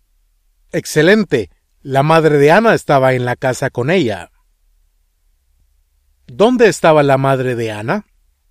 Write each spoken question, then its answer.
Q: ¿Dónde estaba la madre de Anna?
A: En la casa.